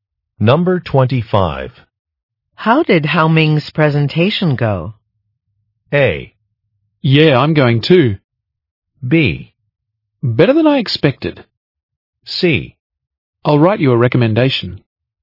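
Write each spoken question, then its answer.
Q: How did Hao Ming's presentation go?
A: B: Better than I expected.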